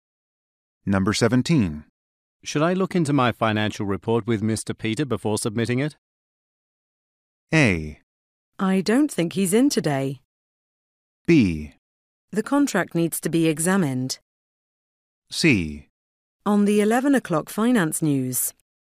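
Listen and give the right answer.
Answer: A: I don't think he's in today.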